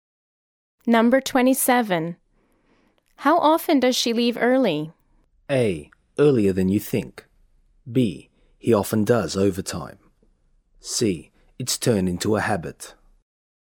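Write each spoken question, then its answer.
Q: How often does she leave early?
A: C: It's turned into a habit.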